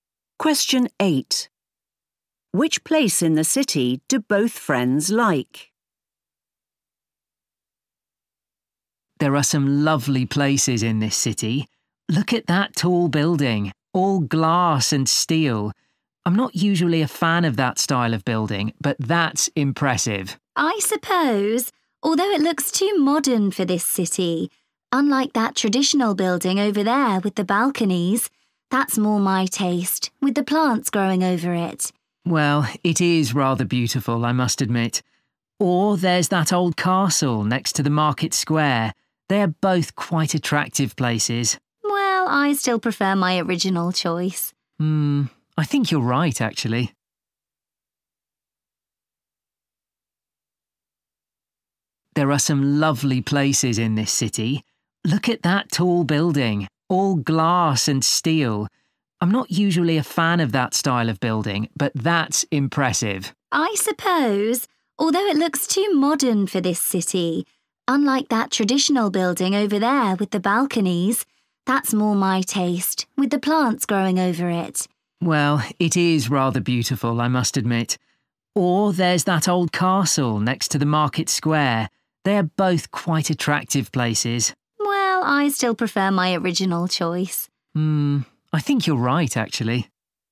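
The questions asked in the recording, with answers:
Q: Which place in the city do both friends like?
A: the traditional building with balconies and plants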